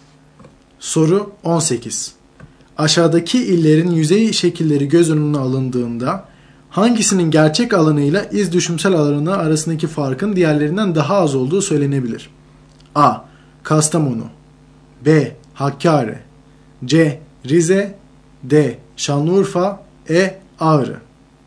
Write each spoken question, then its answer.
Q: Aşağıdaki illerin yüzey şekilleri göz önüne alındığında hangisinin gerçek alanıyla iz düşümsel alanı arasındaki farkın diğerlerinden daha az olduğu söylenebilir?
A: Doğru yanıt D. Şanlıurfa.